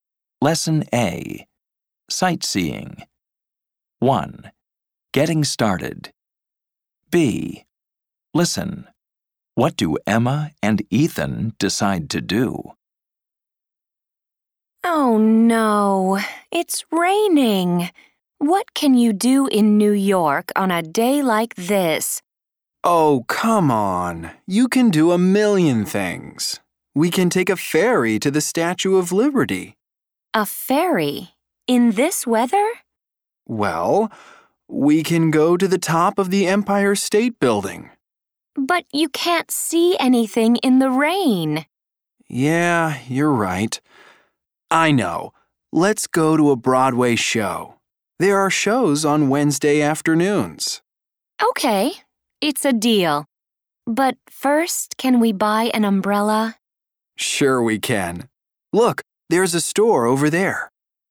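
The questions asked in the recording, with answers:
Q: What do Emma and Ethan decide to do?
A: Go to a Broadway show (after buying an umbrella)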